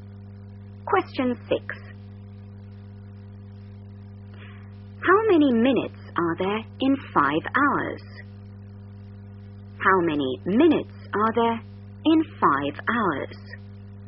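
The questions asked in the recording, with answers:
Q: How many minutes are there in 5 hours?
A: 300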